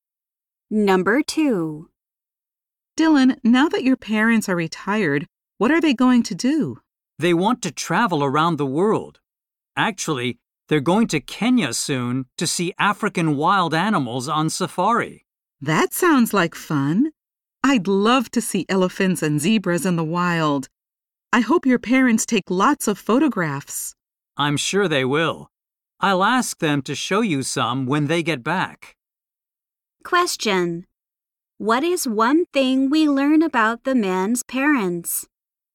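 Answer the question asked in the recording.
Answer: They are retired and are going to Kenya on safari soon.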